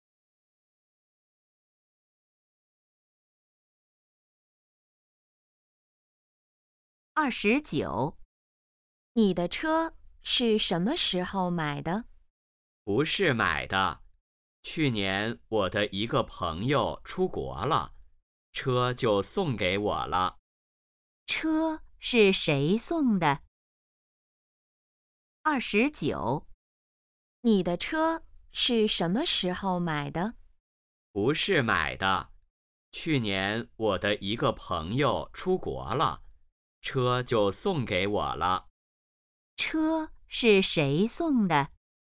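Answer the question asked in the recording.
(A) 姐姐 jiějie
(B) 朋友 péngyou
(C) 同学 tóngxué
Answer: (B) 朋友 péngyou

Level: HSK2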